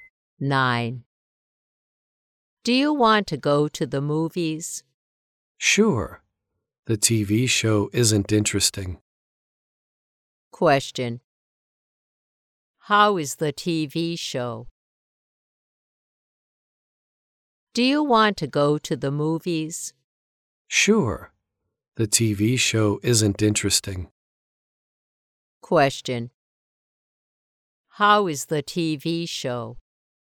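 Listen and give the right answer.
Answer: It isn't interesting.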